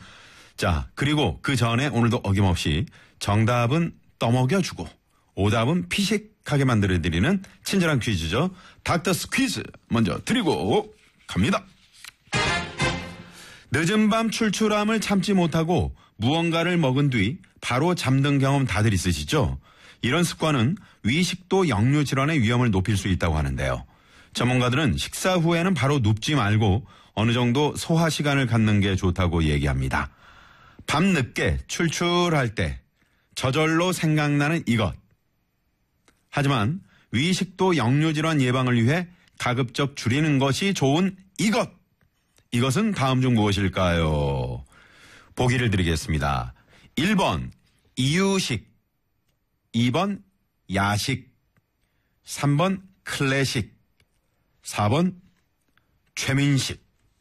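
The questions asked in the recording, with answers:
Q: 이것은 다음 중 무엇일까요?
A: 2: 야식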